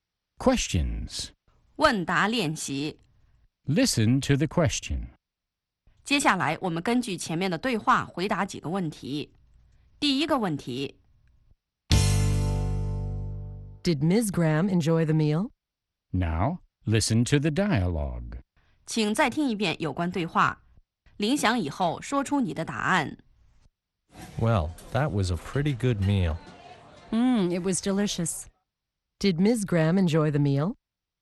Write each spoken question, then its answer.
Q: Did Ms. Graham enjoy the meal?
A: Yes, she did. She thought it was delicious.